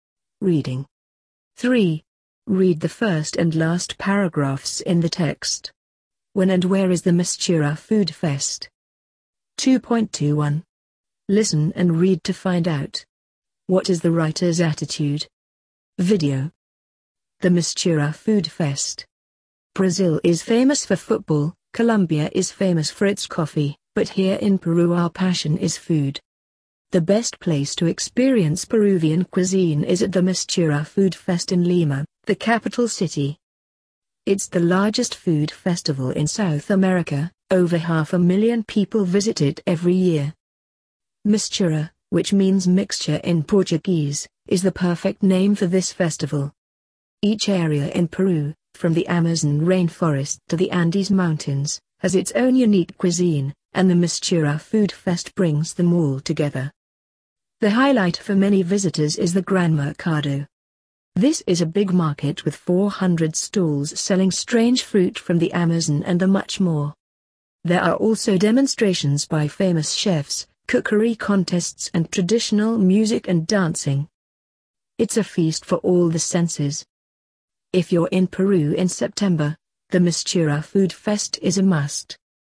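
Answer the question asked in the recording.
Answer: In September, in Lima (Peru)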